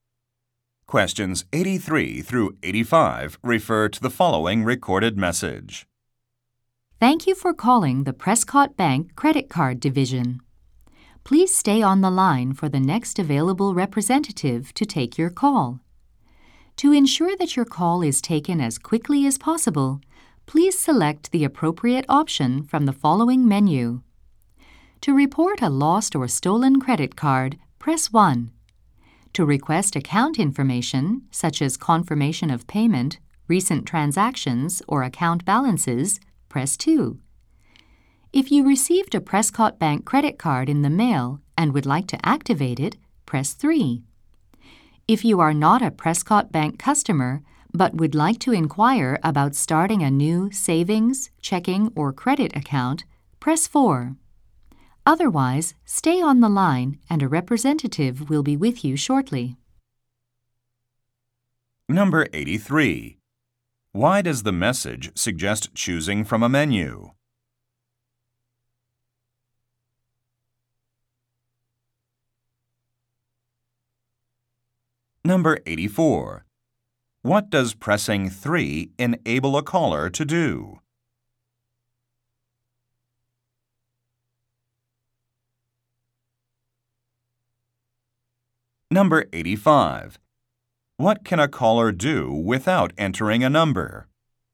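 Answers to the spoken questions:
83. So the call is taken as quickly as possible
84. Activate a new credit card
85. Speak to a representative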